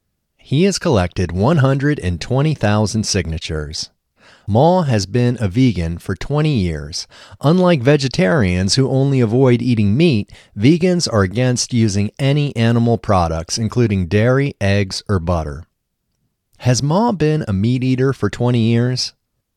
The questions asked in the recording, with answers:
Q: Has Maw been a meat eater for 20 years?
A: No, Maw hasn't been a meat eater for 20 years.